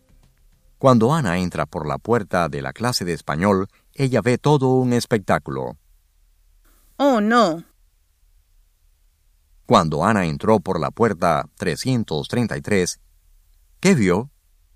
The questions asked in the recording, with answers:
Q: Cuando Ana entró por la puerta 333, ¿qué vio?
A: Ana vio todo el espectáculo cuando ella entró por la puerta 333.